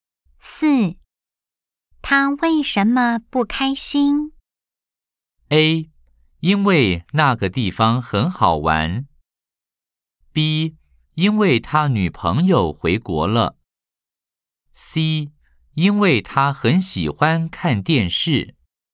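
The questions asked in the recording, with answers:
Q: 他为什么不开心?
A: B: 因为他女朋友回国了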